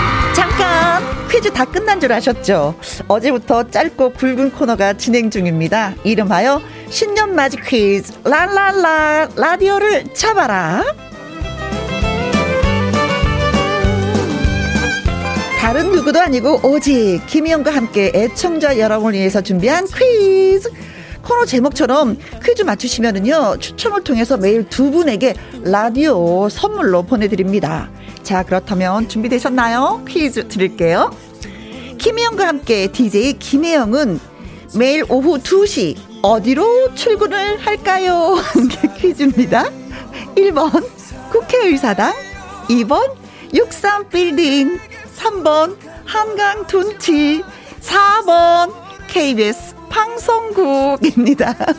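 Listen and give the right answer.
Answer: 4: KBS 방송국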